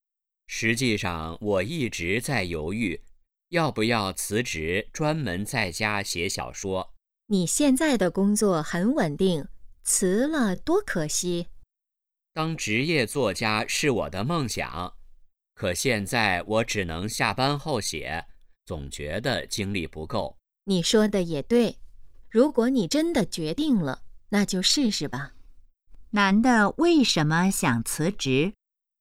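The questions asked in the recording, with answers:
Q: 男的为什么想辞职?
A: 想专门在家写小说,当职业作家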